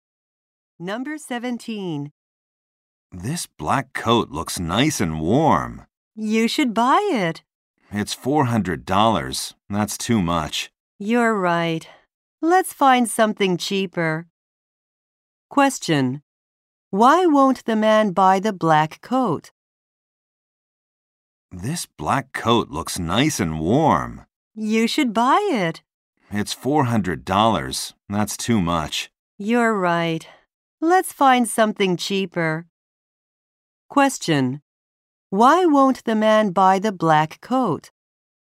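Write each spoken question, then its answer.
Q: Why won't the man buy the black coat?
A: It's too expensive.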